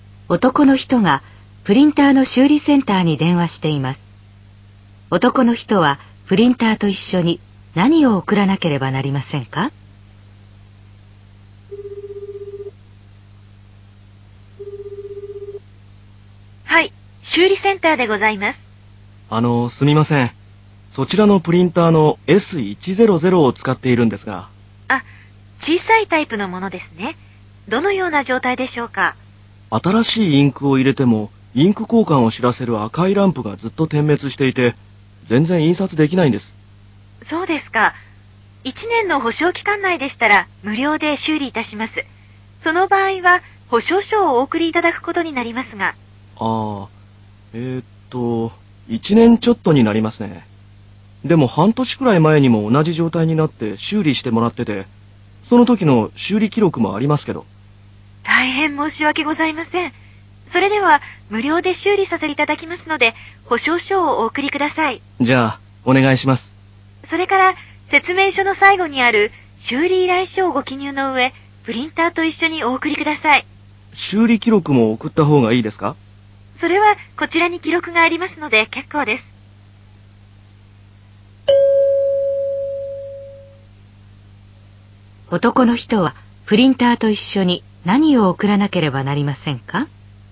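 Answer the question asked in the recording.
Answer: 保証書と修理依頼書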